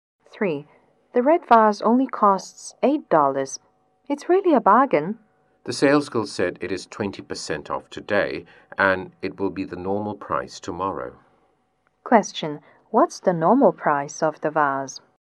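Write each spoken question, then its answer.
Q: What's the normal price of the vase?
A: $10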